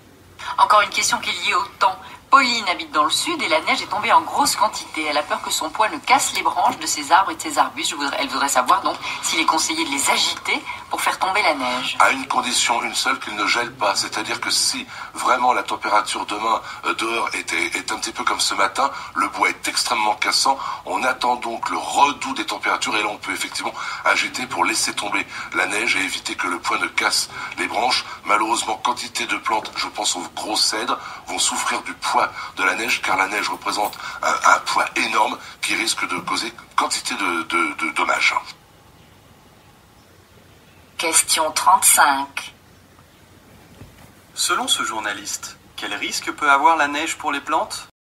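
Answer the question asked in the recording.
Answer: Son poids énorme peut casser les branches et causer beaucoup de dommages.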